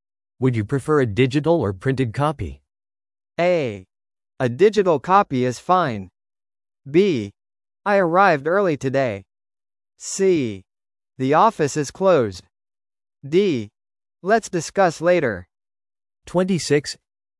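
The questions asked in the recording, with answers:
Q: Would you prefer a digital or printed copy?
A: A: A digital copy is fine.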